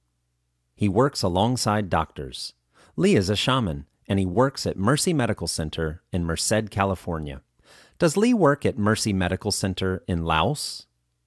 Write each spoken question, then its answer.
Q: Does Li work at Mercy Medical Center in Laos?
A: No, Li does not work at Mercy Medical Center in Laos.